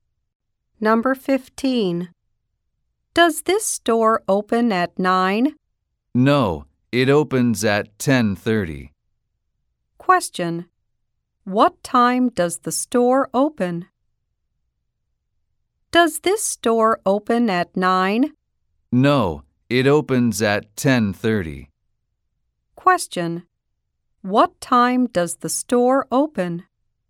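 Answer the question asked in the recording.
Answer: At 10:30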